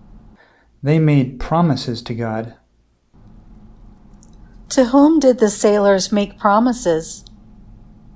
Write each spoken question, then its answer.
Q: To whom did the sailors make promises?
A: The sailors made promises to God.